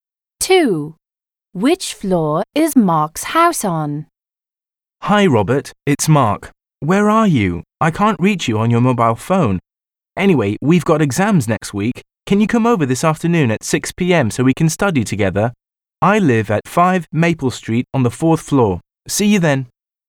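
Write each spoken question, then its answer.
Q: Which floor is Mark's house on?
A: The 4th floor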